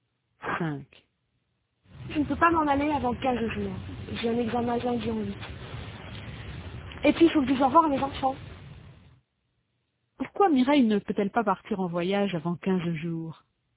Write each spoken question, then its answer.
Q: Pourquoi Mireille ne peut-elle pas partir en voyage avant 15 jours?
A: Parce qu'elle a un examen de lundi en 8 et qu'il faut qu'elle dise au revoir à ses enfants.